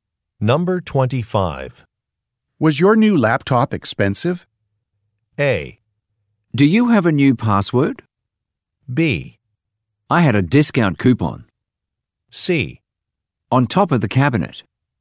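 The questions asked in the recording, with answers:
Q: Was your new laptop expensive?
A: B: I had a discount coupon.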